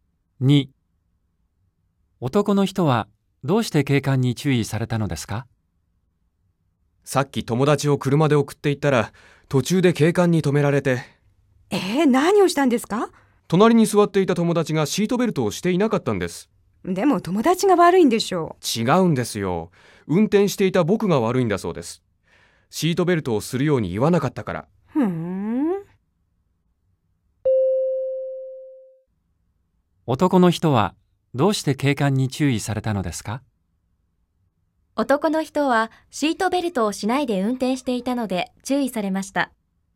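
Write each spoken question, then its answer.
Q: 男の人はシートベルトをしないで運転していたので注意されました。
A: ×(友達にシートベルトをするように言わなかったから)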